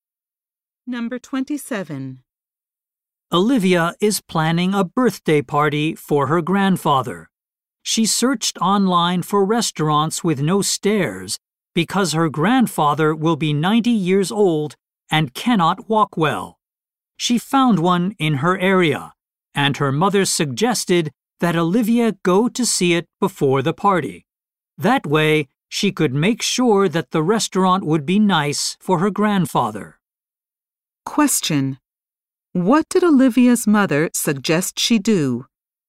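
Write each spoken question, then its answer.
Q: What did Olivia's mother suggest she do?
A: Go to see the restaurant before the party.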